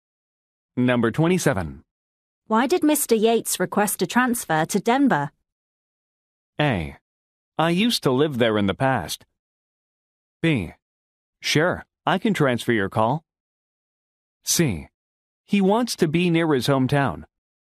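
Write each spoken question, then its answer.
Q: Why did Mr. Yates request a transfer to Denver?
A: C: He wants to be near his hometown.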